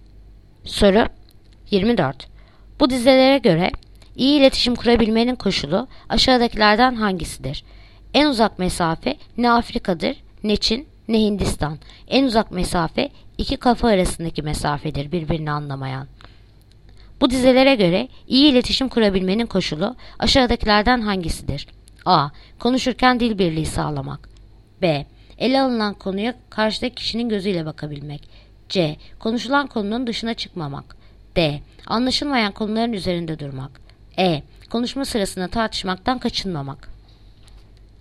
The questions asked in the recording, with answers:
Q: Bu dizelere göre iyi iletişim kurabilmenin koşulu aşağıdakilerden hangisidir?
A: Bursa. Ele alınan konuya karşıdaki kişinin gözüyle bakabilmek.